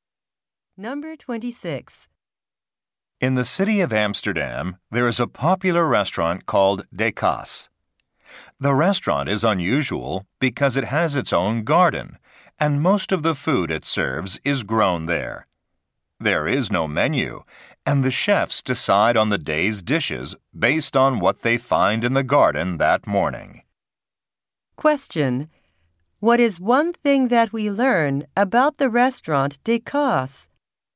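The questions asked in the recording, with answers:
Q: What is one thing that we learn about the restaurant De Kaas?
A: Most of its food is grown in its own garden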